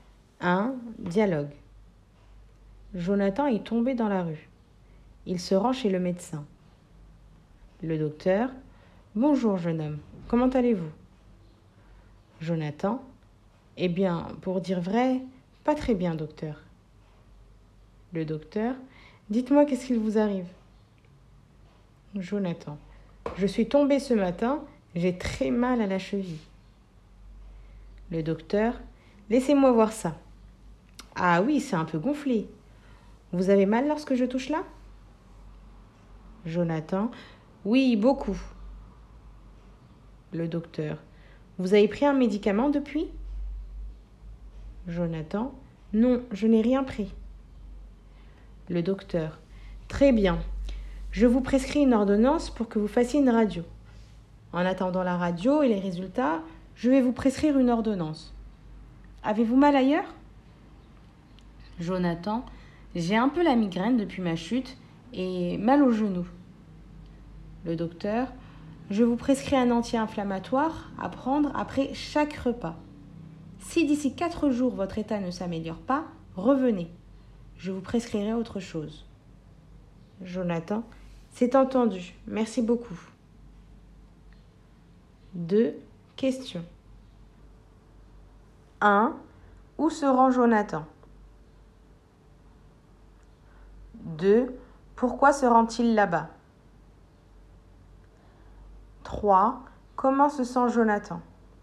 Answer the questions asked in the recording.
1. Il se rend chez le docteur.
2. Car il est tombé dans la rue.
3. Il ne se sent pas très bien.